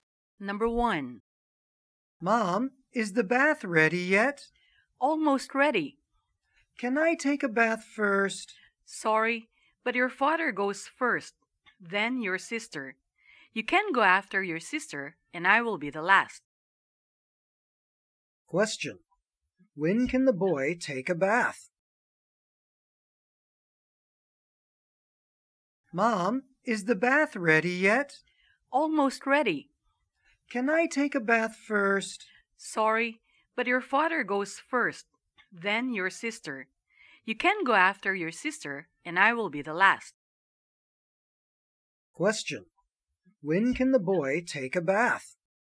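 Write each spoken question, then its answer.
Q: When can the boy take a bath?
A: After his sister (third)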